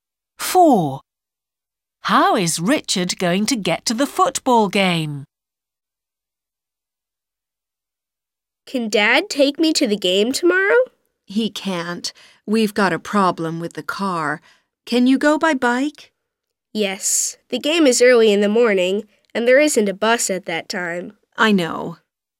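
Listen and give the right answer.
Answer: by bike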